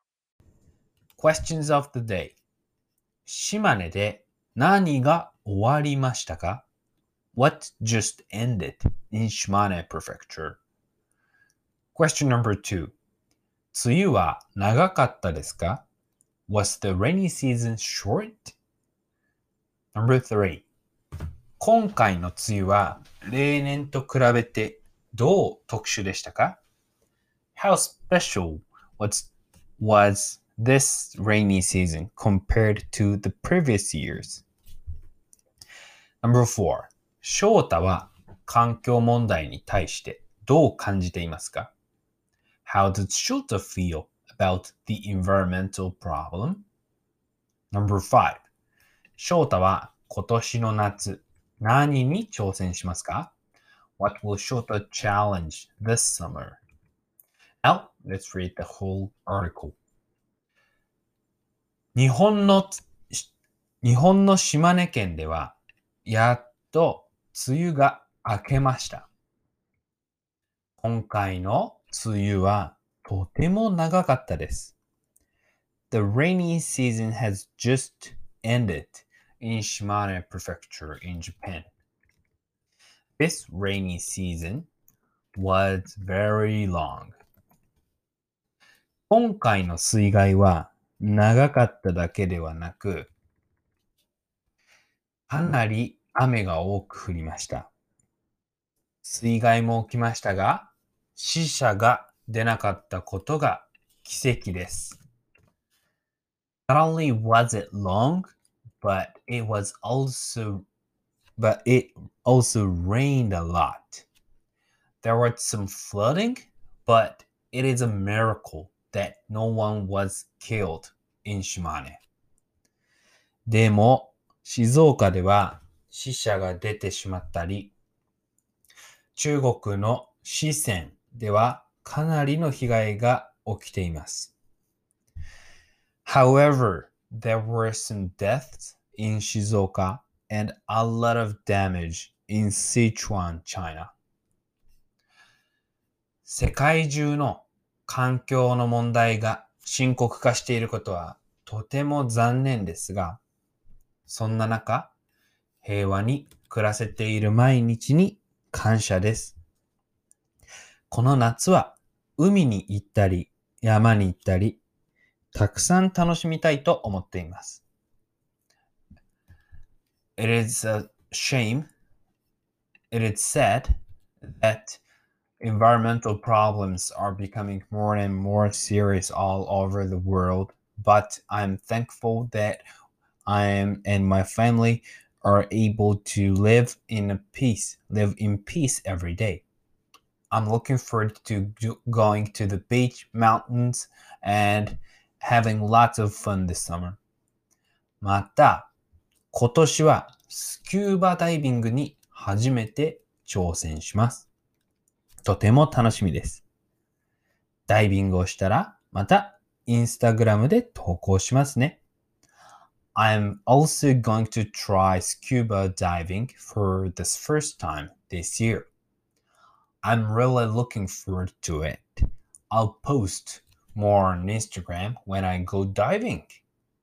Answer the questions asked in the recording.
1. 梅雨が終わりました。
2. It was とても長かったです。
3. 今回の梅雨は長かっただけでなくかなり雨が多く降りました。
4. 世界中で環境の問題が深刻化していることはとても残念ですが、そんな中、平和に暮らせている毎日に感謝です。
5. 今年はスキューバダイビングに初めて挑戦します。